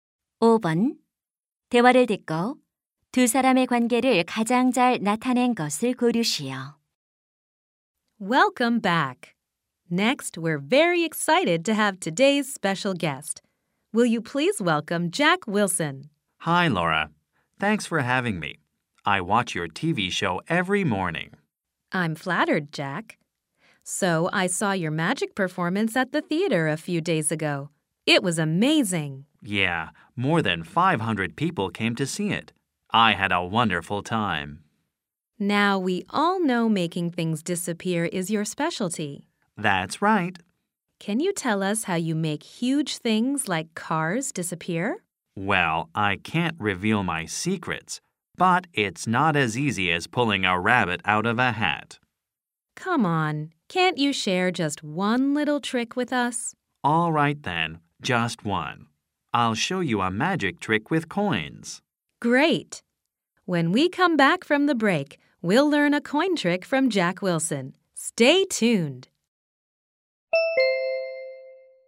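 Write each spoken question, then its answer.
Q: 대화를 듣고 두 사람의 관계를 가장 잘 나타낸 것을 고르시오.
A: TV 쇼 진행자 - 마술사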